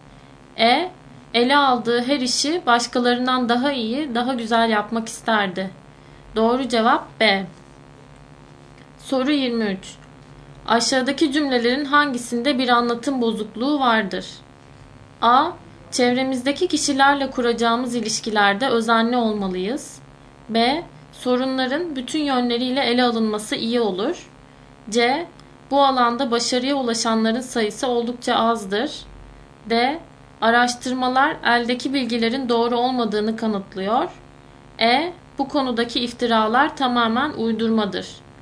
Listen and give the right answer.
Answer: Doğru cevap E.